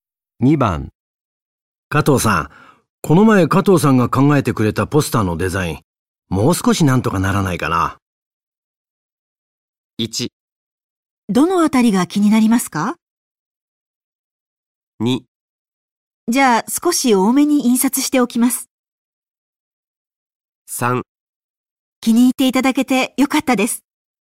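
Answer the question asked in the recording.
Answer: 1: どのあたりが気になりますか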